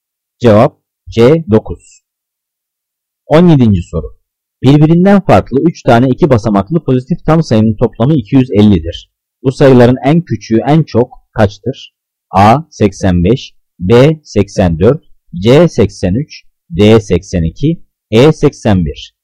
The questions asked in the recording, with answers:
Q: Bu sayıların en küçüğü en çok kaçtır?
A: Cevap D 82.